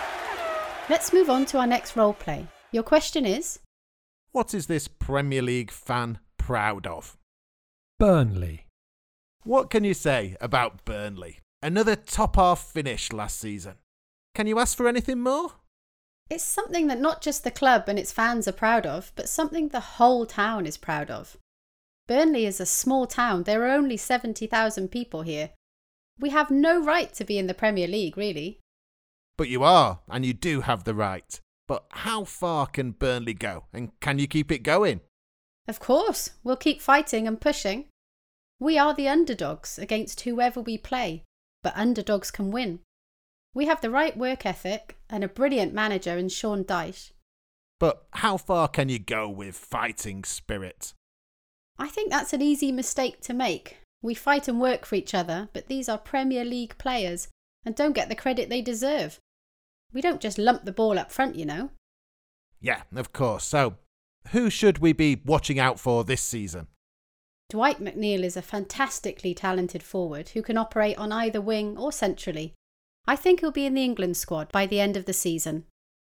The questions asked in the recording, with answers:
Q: What is this Premier League fan proud of?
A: She said she was proud of her club and how a small club and a small town can be battling against other Premier League clubs based in large cities with larger fan bases.